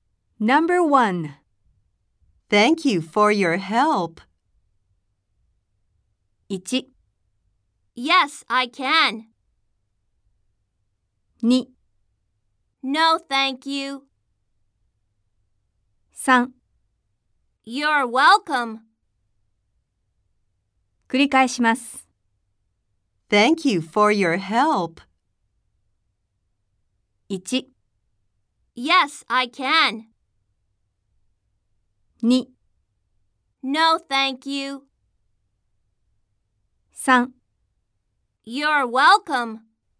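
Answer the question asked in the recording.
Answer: 3: You're welcome.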